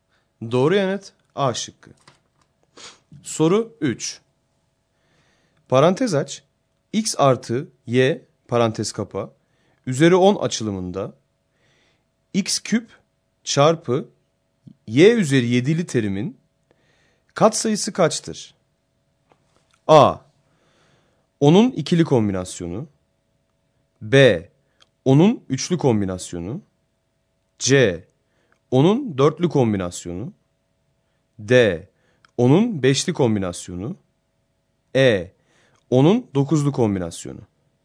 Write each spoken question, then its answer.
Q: Parantez aç, x artı y parantez kapa, üzeri 10 açılımında, x küp çarpı y üzeri 7'li terimin katsayısı kaçtır?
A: Doğru yanıt B şıkkı.